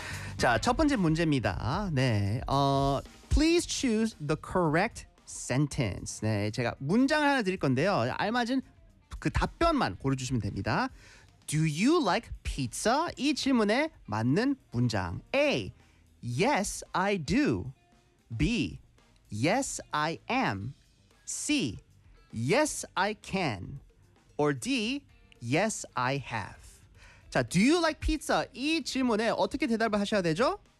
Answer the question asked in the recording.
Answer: Yes, I do. 맞습니다.